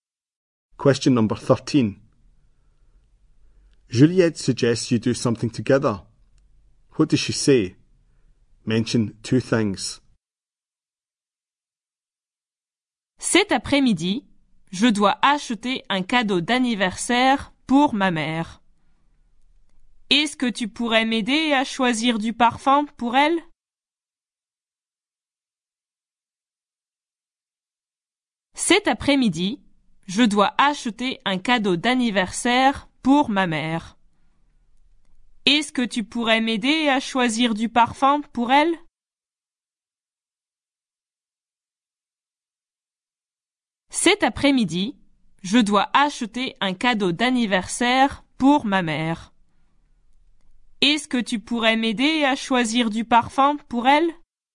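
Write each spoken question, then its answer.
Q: Juliette suggests you do something together.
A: Buy a birthday present for her mother this afternoon; help choose perfume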